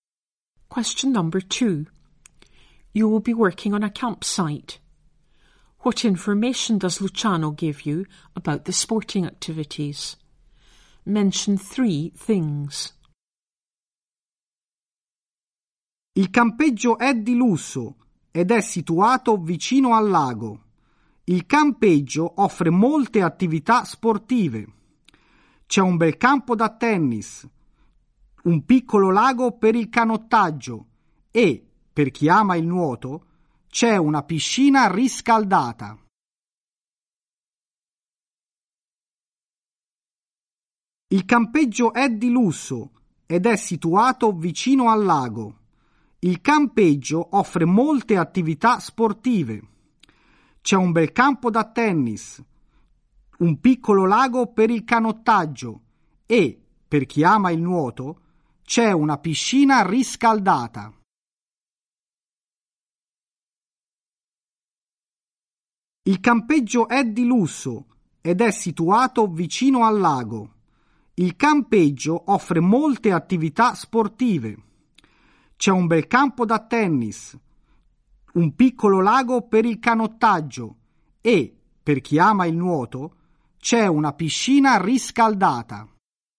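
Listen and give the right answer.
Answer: A tennis court, a small lake for rowing, a heated swimming pool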